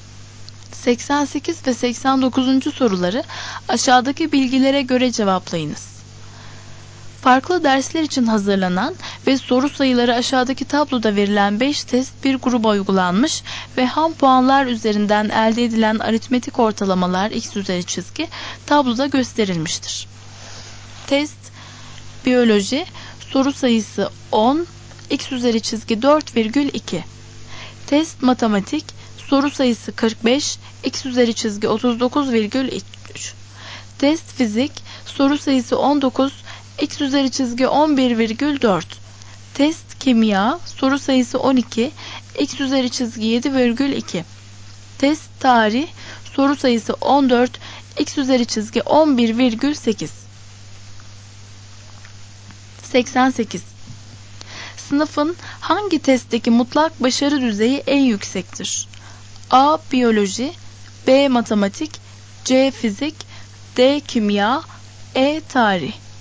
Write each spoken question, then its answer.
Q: Sınıfın hangi testteki mutlak başarı düzeyi en yüksektir?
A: Doğru cevap B.